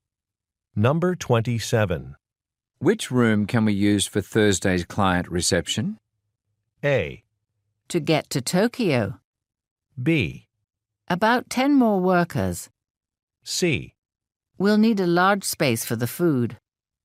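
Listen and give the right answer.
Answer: C: We'll need a large space for the food.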